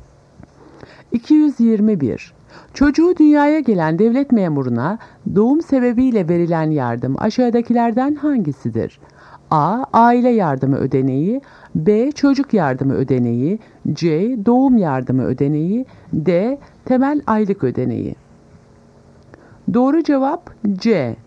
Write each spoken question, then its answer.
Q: Çocuğu dünyaya gelen devlet memuruna doğum sebebiyle verilen yardım aşağıdakilerden hangisidir?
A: Doğru cevap C. Doğum yardımı ödeneği.